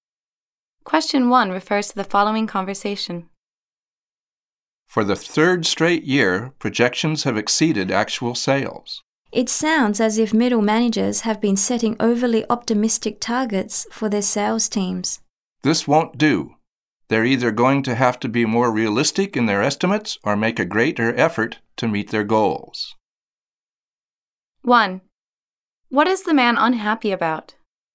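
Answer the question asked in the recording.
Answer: Sales have fallen short of projections because managers set overly optimistic targets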